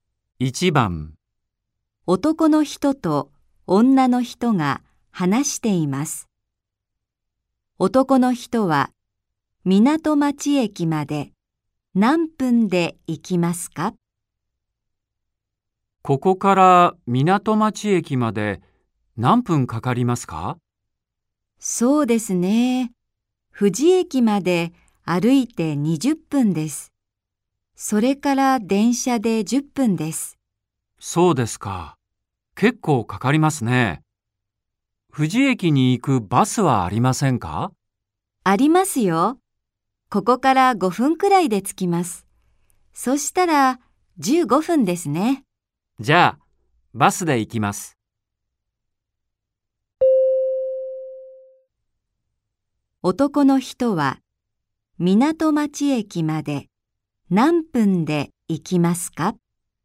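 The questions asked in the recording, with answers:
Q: 男の人は港町駅まで何分で行きますか?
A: 15分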